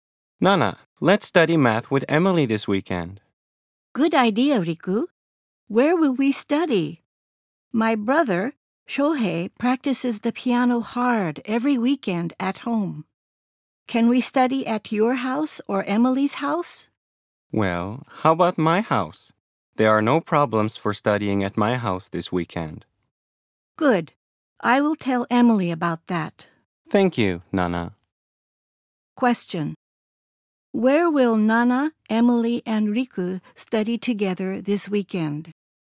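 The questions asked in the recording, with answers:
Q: Where will Nana, Emily, and Riku study together this weekend?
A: At Nana's house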